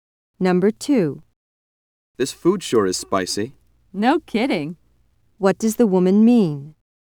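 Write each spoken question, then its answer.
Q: What does the woman mean?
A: She agrees the food is very spicy.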